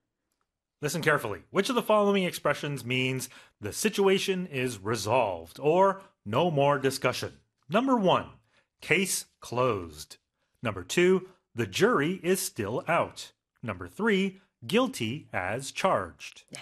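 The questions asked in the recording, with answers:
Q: Which of the following expressions means the situation is resolved or no more discussion?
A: 1: case closed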